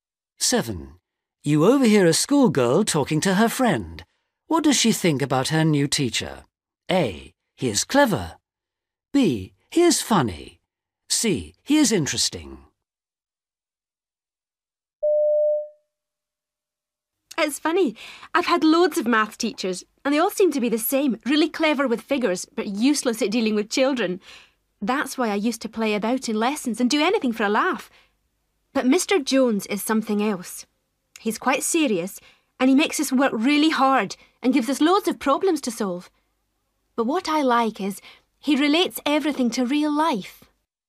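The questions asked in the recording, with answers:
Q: What does she think about her new teacher?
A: C: He is interesting.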